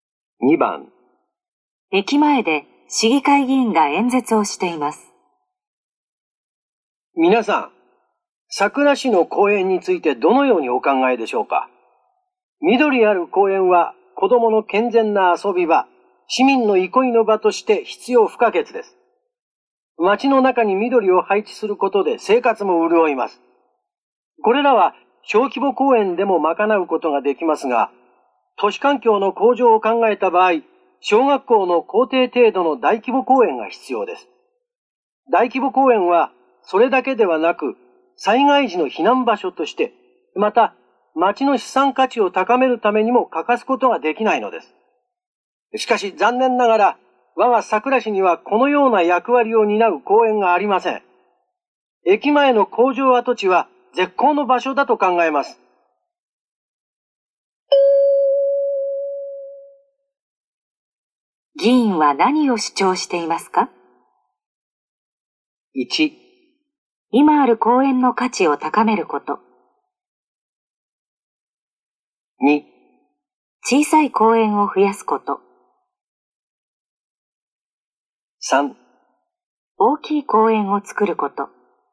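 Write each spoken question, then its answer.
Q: 議員は何を主張していますか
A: 3: 大きい公園を作ること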